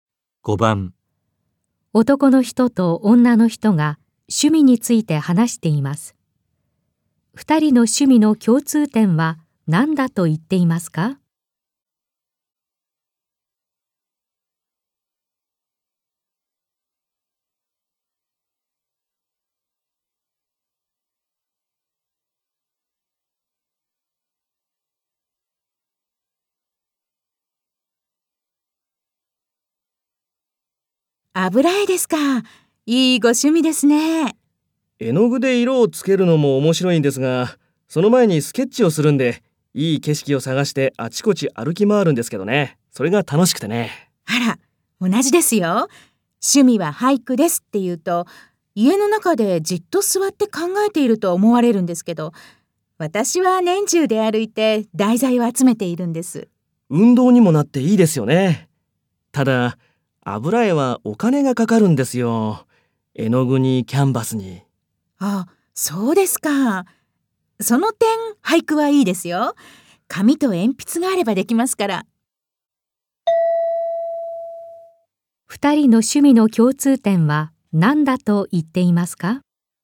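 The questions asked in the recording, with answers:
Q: 二人の趣味の共通点は何だと言っていますか?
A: 題材や景色を探して外をあちこち歩き回ること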